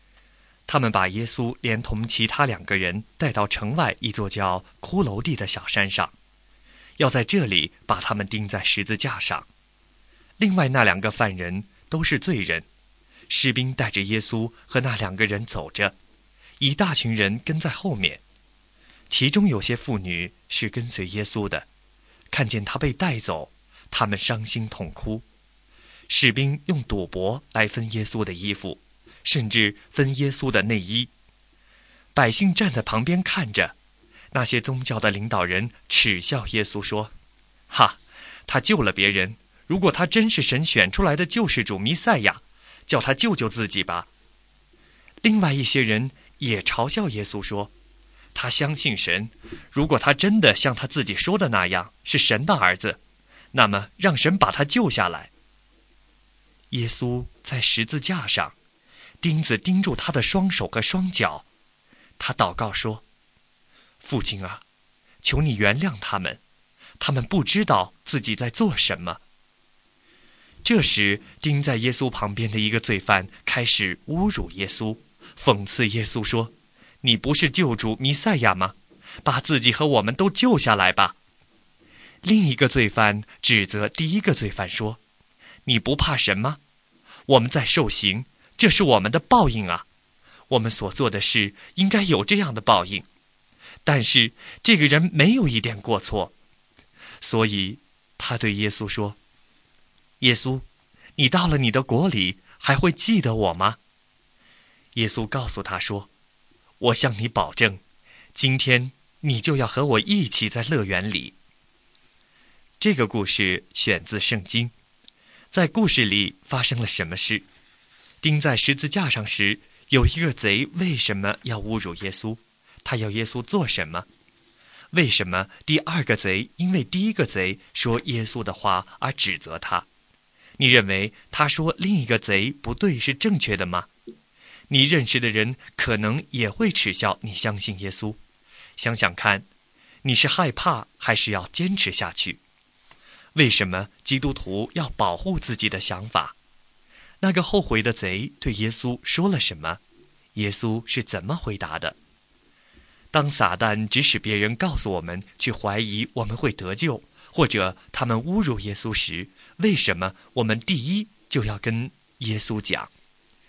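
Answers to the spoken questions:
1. 把他自己和他们都从十字架上救下来
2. 耶稣,你到了你的国里还会记得我吗?
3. 今天你就要和我一起在乐园里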